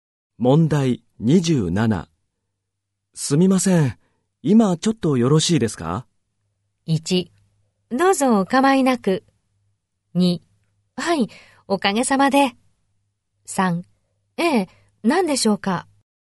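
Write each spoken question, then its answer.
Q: すみません、今ちょっとよろしいですか?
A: 2: ええ、何でしょうか?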